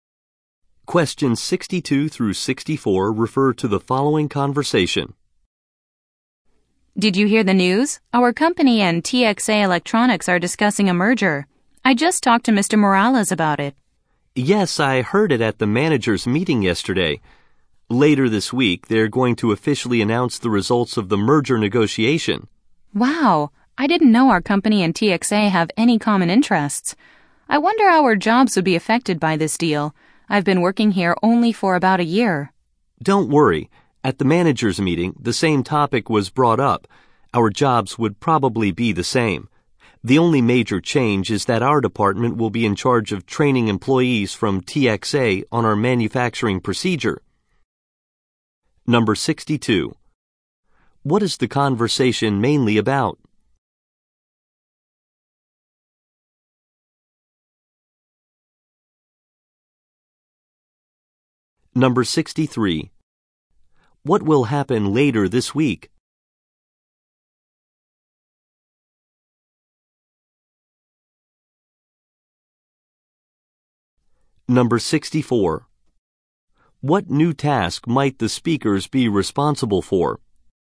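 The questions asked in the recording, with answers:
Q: What is the conversation mainly about?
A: A company merger

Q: What will happen later this week?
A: The merger negotiation results will be announced

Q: What new task might the speakers be responsible for?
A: Training TXA employees on manufacturing procedures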